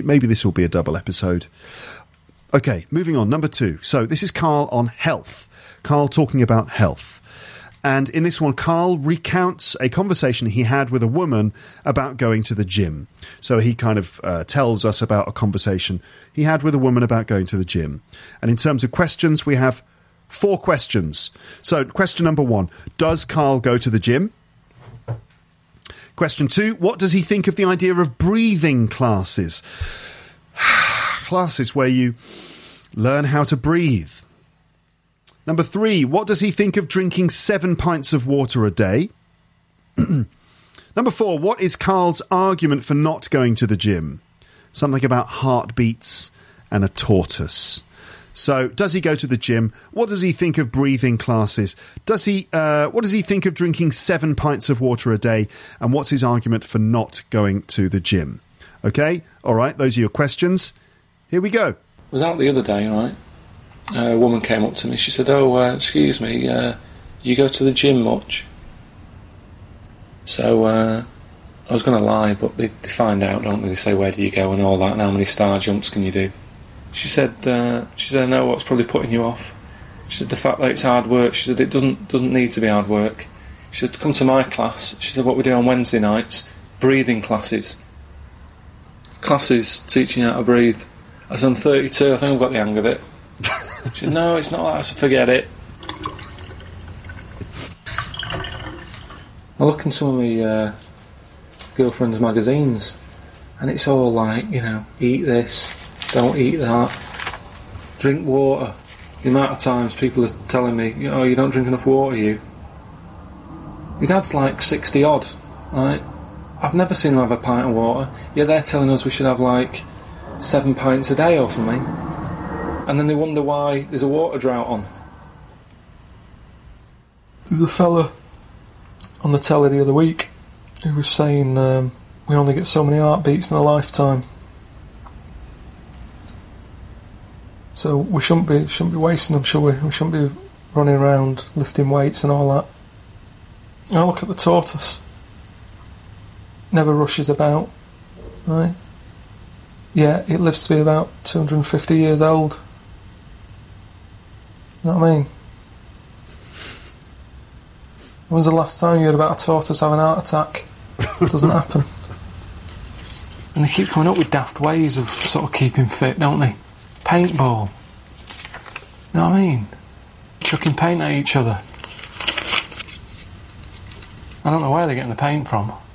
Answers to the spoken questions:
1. No, he doesn't.
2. He thinks it's he doesn't need breathing classes because after 32 years of living, he thinks he's got the hang of it.
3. Again, he thinks it's unnecessary.
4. you only get a certain number of heartbeats in your life and you shouldn't waste them going to the gym and lifting weights and things.